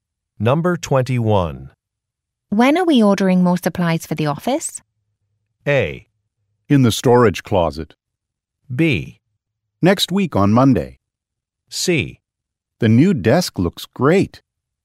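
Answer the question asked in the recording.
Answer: B: Next week on Monday.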